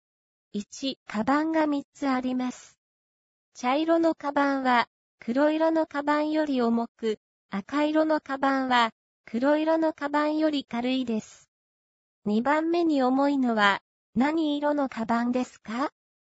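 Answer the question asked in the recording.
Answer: 黒色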